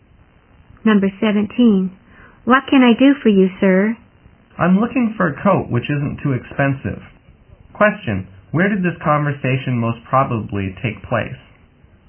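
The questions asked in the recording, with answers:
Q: Question, where did this conversation most probably take place?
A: In a clothes shop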